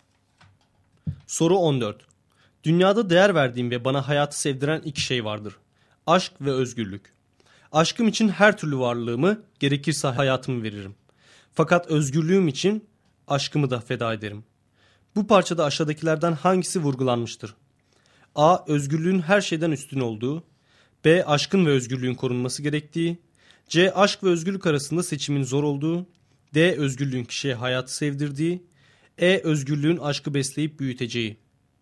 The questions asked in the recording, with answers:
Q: Bu parçada aşağıdakilerden hangisi vurgulanmıştır?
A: Doğru cevap A şıkkı.